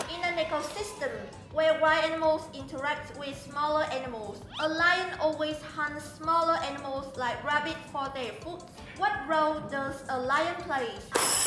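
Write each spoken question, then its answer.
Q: What role does a lion play?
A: Predator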